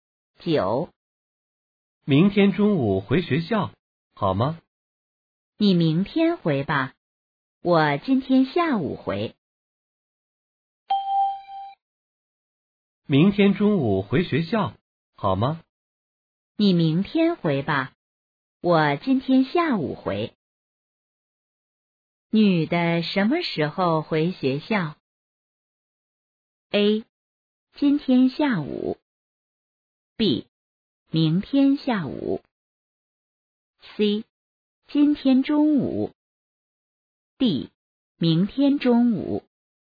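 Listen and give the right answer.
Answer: A: 今天下午。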